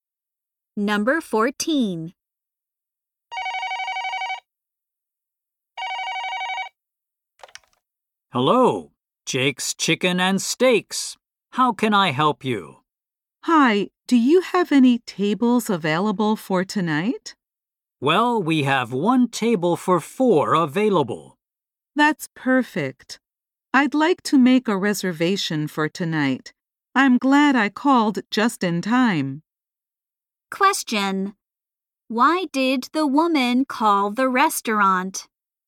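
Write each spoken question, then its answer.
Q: Why did the woman call the restaurant?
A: To make a reservation for tonight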